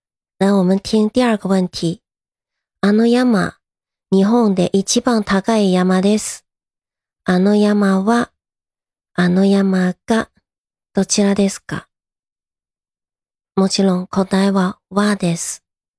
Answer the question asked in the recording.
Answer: もちろん答えは、はです。